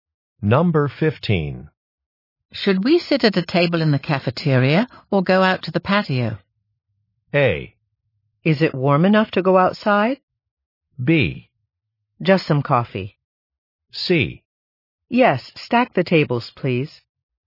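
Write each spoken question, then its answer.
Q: Should we sit at a table in the cafeteria or go out to the patio?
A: A: Is it warm enough to go outside?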